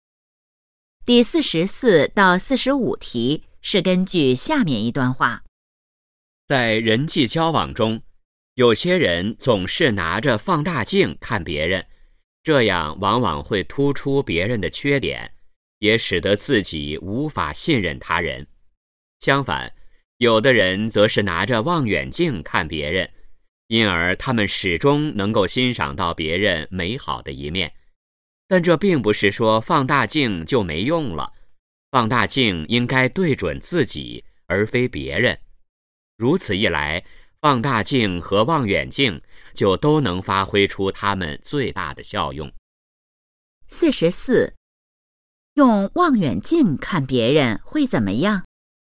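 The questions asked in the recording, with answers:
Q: 用望远镜看别人会怎么样?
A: 能欣赏到别人美好的一面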